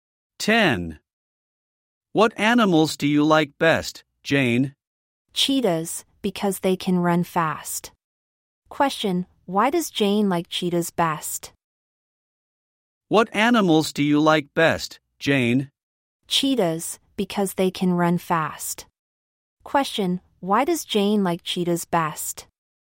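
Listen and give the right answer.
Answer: Because they can run fast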